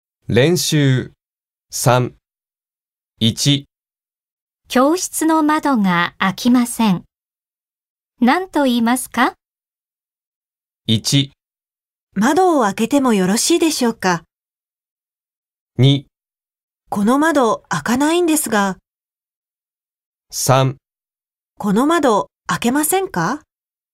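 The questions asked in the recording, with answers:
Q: 教室の窓が開きません。何と言いますか?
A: 2: この窓開かないんですが。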